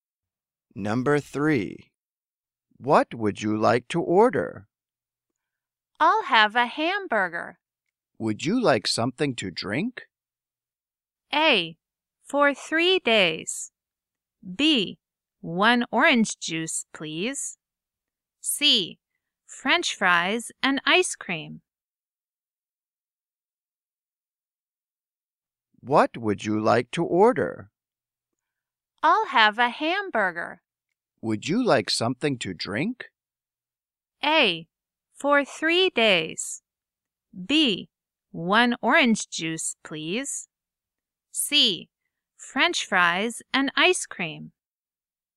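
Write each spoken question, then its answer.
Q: Would you like something to drink?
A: B: 1 orange juice, please.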